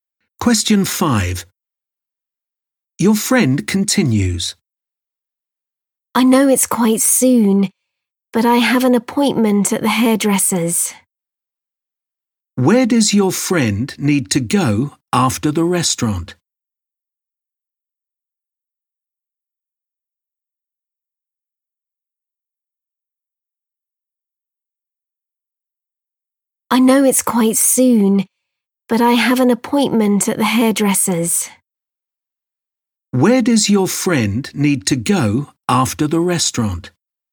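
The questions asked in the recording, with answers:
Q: Where does your friend need to go after the restaurant?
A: The hairdresser's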